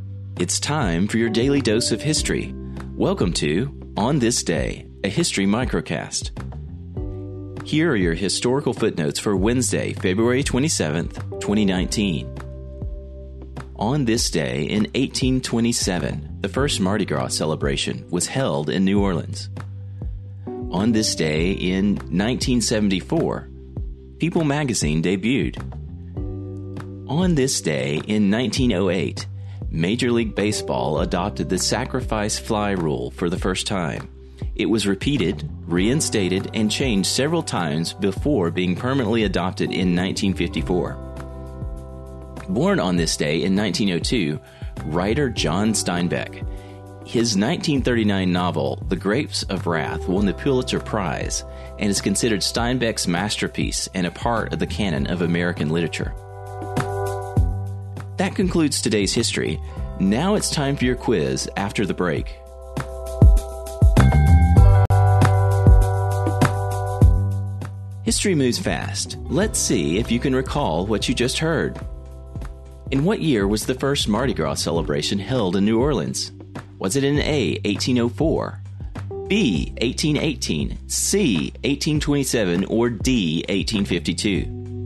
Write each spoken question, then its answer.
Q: In what year was the first Mardi Gras celebration held in New Orleans?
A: The answer is C, 1827 was the year of the first Mardi Gras celebration in New Orleans.